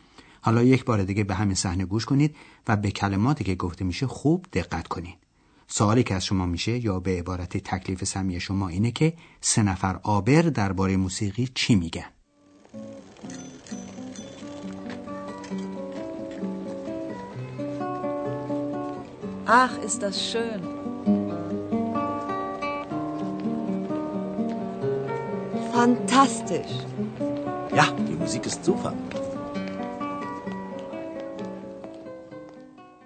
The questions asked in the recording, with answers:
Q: سه نفر آبر درباره موسیقی چی میگن؟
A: هر سه آبر از موسیقی که شنیدن خوششون اومد